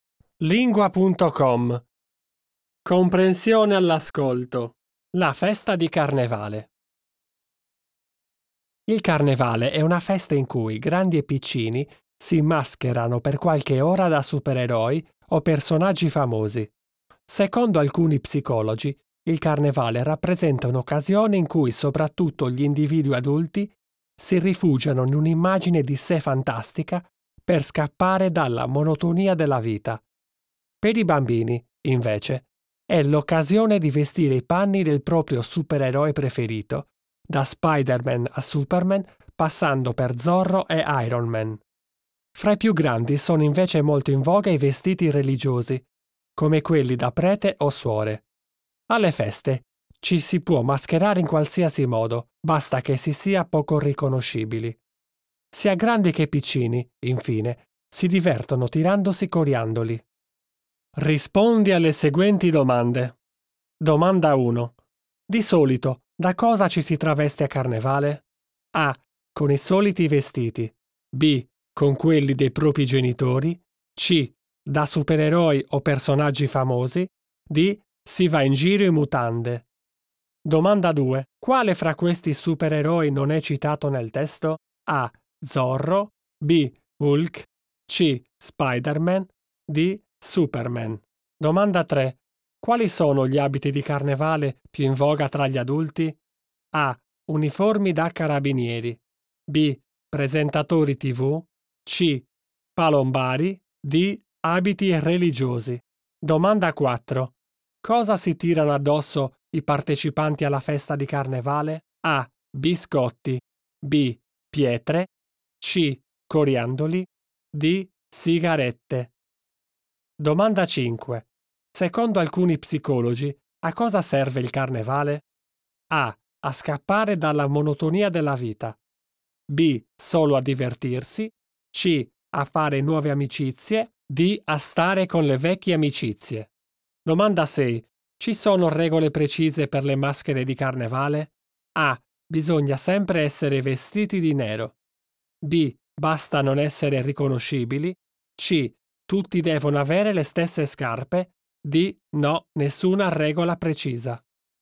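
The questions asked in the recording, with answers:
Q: Di solito, da cosa ci si traveste a Carnevale?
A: C: Da supereroi o personaggi famosi.

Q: Quale fra questi supereroi non è citato nel testo?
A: B: Hulk.

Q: Quali sono gli abiti di carnevale più in voga tra gli adulti?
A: D: Abiti religiosi.

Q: Cosa si tirano addosso i partecipanti alla festa di carnevale?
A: C: Coriandoli.

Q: Secondo alcuni psicologi, a cosa serve il carnevale?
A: A: A scappare dalla monotonia della vita.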